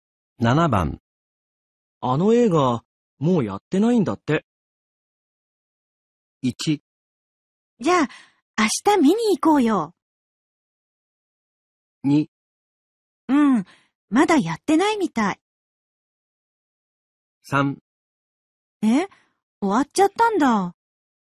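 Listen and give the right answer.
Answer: 3: え終わっちゃったんだ。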